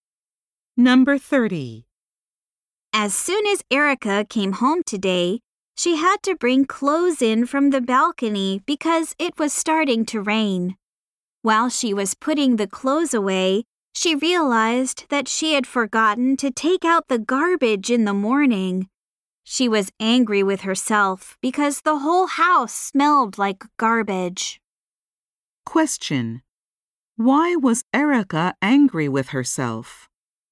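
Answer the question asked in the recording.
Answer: She forgot to take out the garbage.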